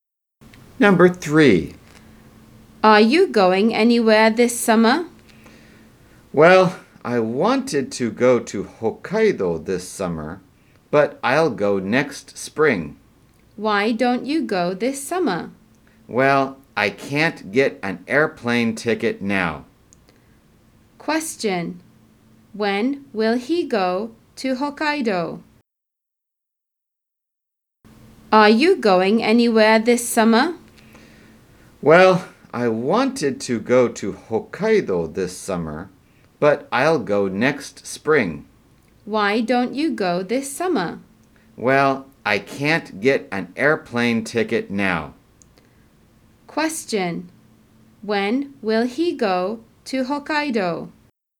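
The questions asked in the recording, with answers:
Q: When will he go to Hokkaido?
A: Next spring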